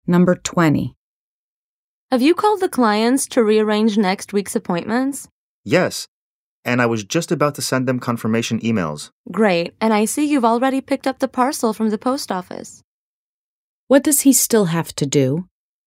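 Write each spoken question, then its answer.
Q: What does he still have to do?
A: Send confirmation emails to the clients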